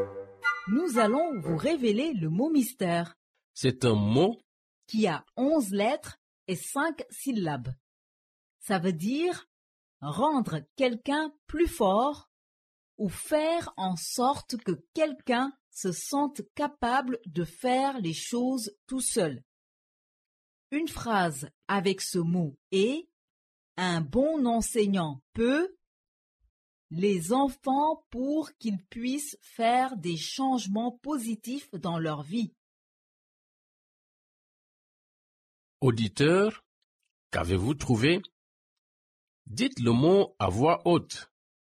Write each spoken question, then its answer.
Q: Auditeur, qu'avez-vous trouvé?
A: Le mot mystère d'aujourd'hui est autonomiser.